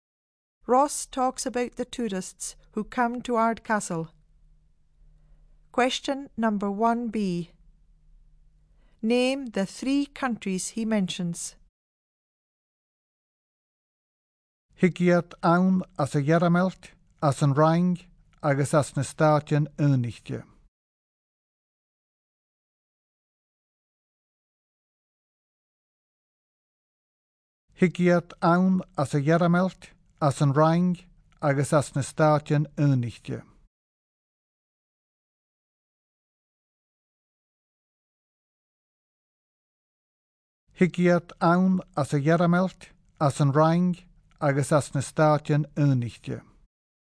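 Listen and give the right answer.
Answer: Germany, France and the United States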